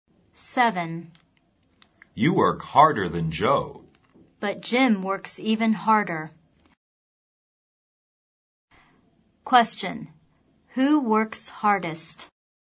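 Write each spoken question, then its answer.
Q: Who works hardest?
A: Jim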